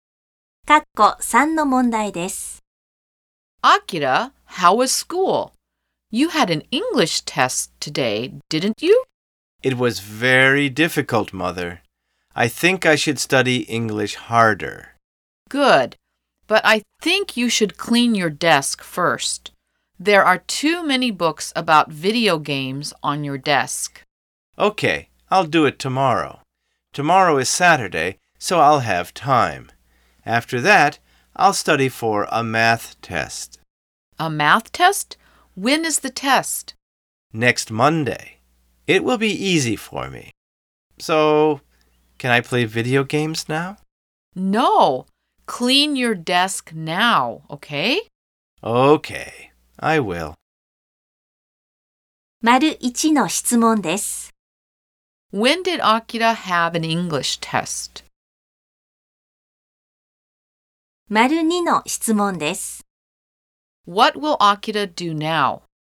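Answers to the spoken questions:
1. Today (Friday)
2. He will clean his desk.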